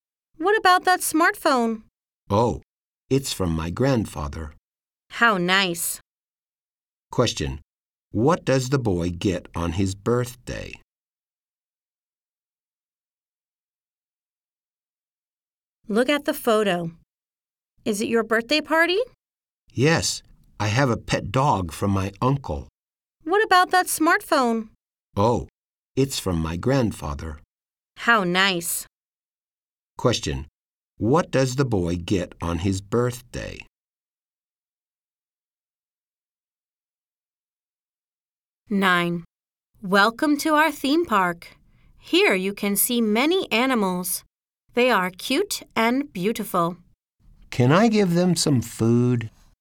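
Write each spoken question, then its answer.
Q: What does the boy get on his birthday?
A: A pet dog and a smartphone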